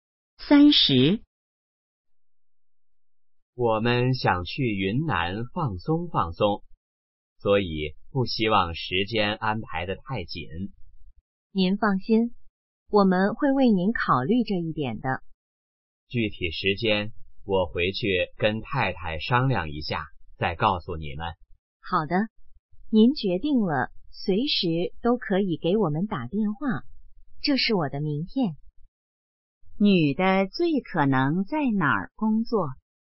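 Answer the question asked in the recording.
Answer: 旅行社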